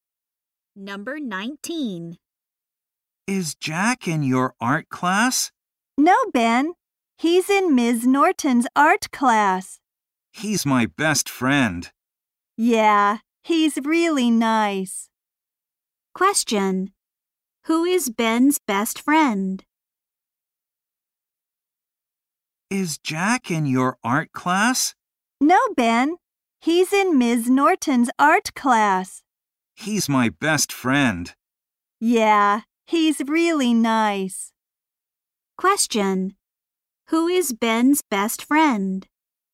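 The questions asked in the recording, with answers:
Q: Question. Who is Ben's best friend?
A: Jack.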